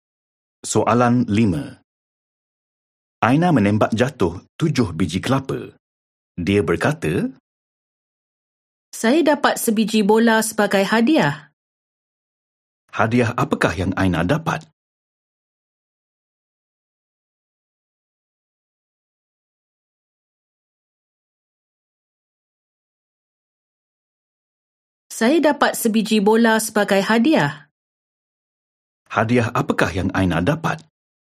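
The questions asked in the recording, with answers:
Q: Hadiah apakah yang Aina dapat?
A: Sebiji bola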